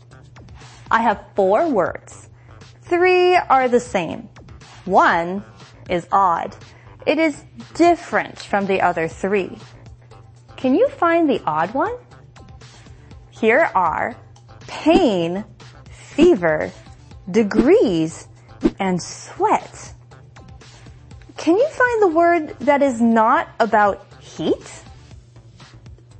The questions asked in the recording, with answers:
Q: Can you find the word that is not about heat?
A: It's pain.